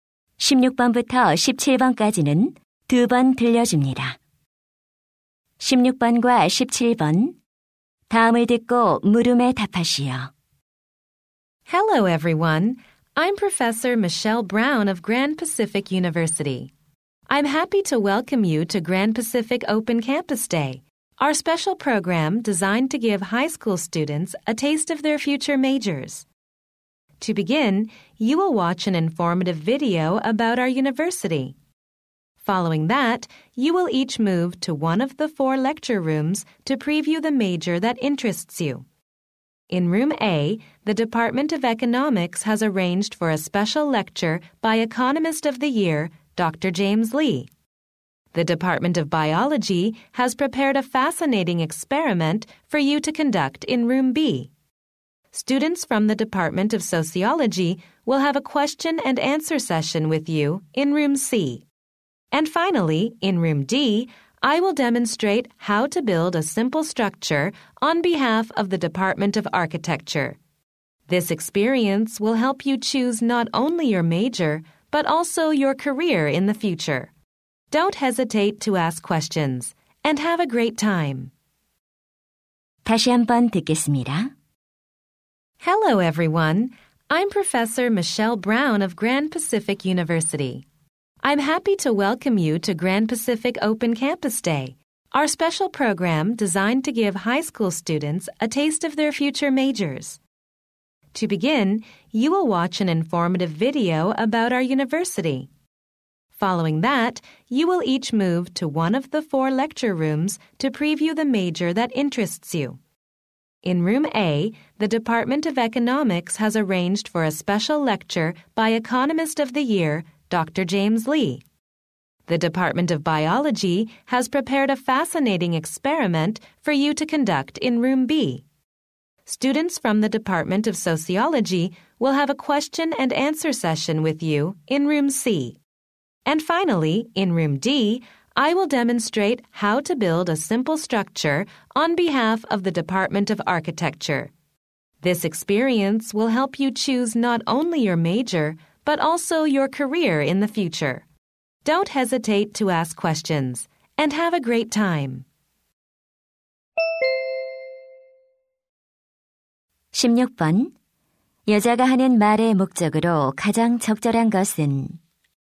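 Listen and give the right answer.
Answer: 오픈 캠퍼스 데이 프로그램을 소개하려고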